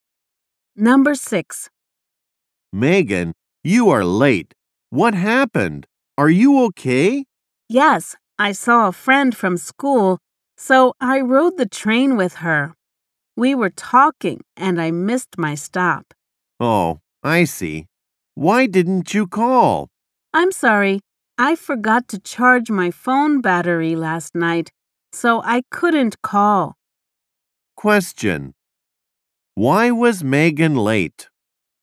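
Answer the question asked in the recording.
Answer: She was talking with a friend and missed her stop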